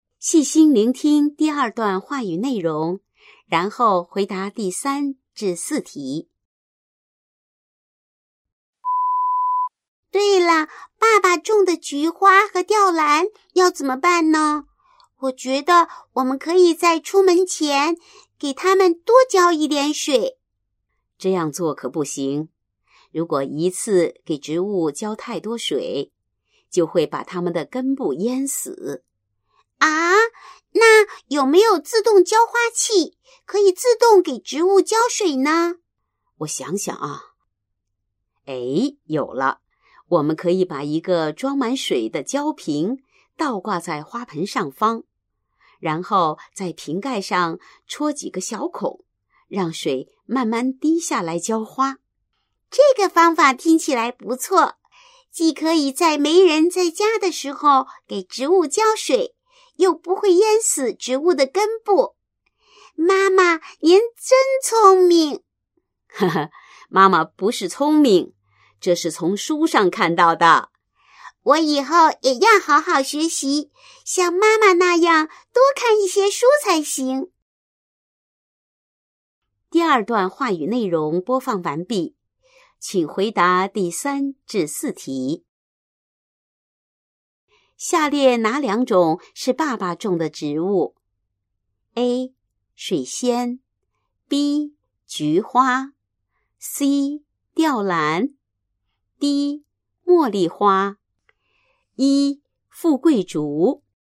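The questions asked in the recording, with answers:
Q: 下列哪两种是爸爸种的植物?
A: B: 菊花;C: 吊兰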